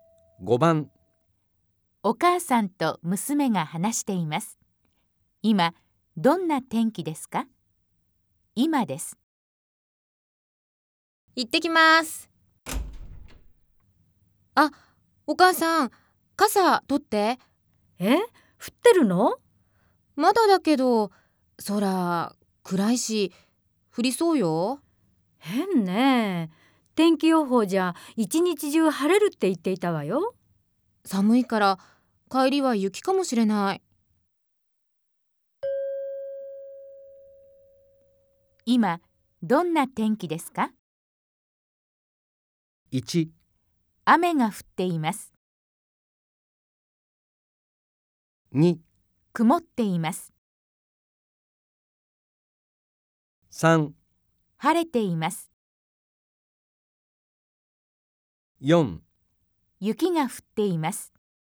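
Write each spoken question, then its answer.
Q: 今どんな天気ですか?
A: 2: 曇っています。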